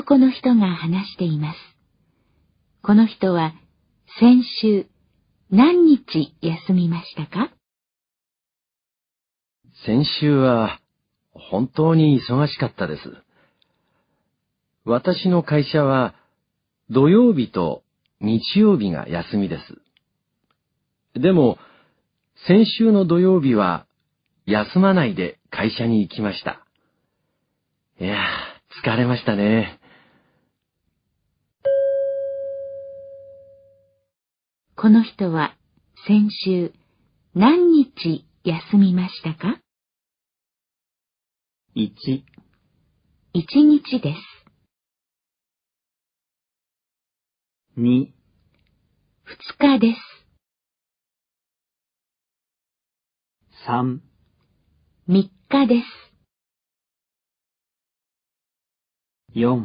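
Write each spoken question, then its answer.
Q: この人は先週何日休みましたか?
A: 1: 1日です。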